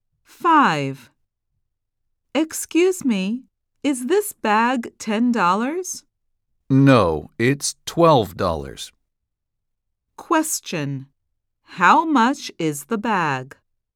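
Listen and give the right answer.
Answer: $12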